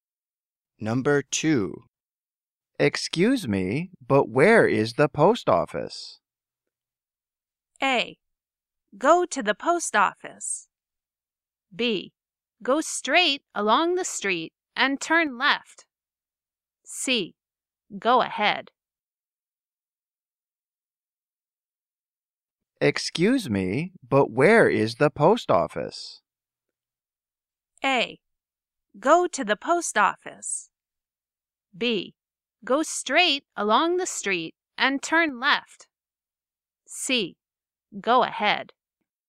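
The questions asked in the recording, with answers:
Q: Excuse me, but where is the post office?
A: B: Go straight along the street and turn left.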